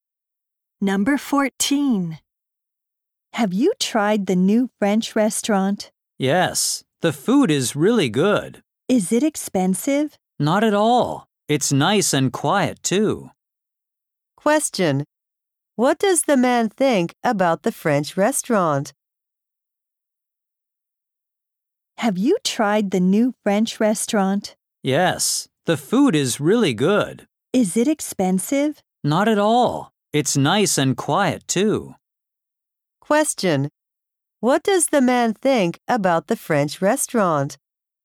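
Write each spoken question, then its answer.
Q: What does the man think about the French restaurant?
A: The food is really good, it's not expensive, and it's quiet.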